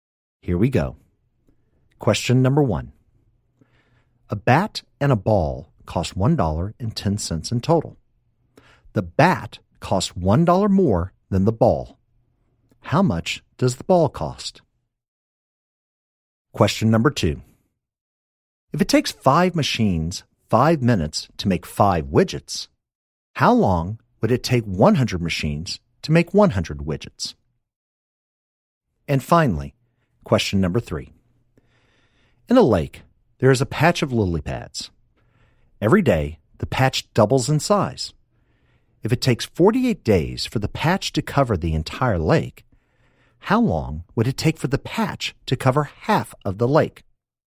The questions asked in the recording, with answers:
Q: How much does the ball cost?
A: the ball cost 5 cents

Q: If it takes 5 machines 5 minutes to make 5 widgets, how long would it take 100 machines to make 100 widgets?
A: 100 machines, 100 widgets in 5 minutes

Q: If it takes 48 days for the patch to cover the entire lake, how long would it take for the patch to cover half of the lake?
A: So the answer is 47 days.